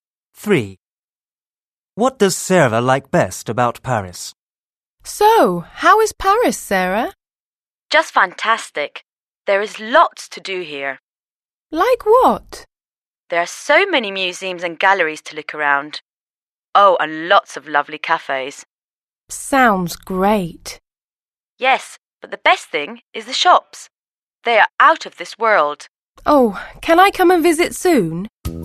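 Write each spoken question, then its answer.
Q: What does Sarah like best about Paris?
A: The shops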